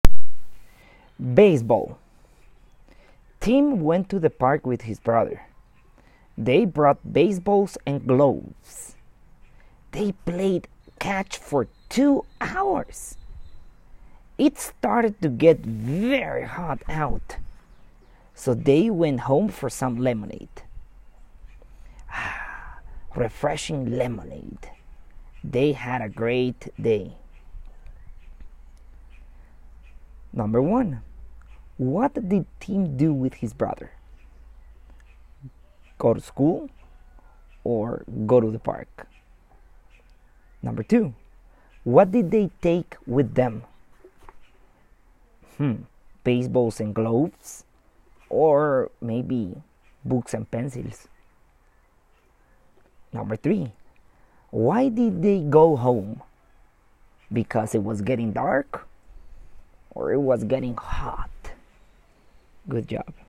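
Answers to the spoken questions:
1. go to the park
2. baseballs and gloves
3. it was getting hot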